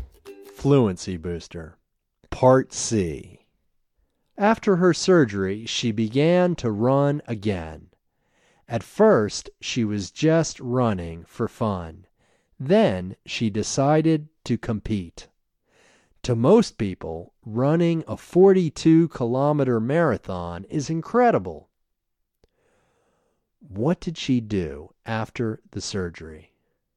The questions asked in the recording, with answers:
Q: What did she do after the surgery?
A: After the surgery, she began to run again.